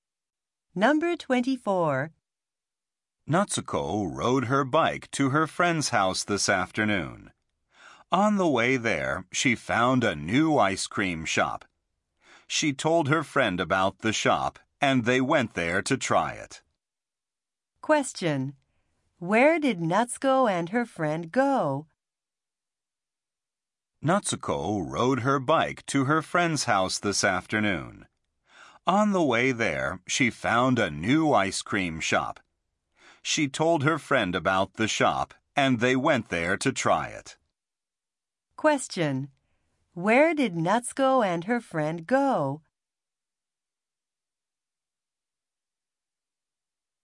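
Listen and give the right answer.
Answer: To a new ice cream shop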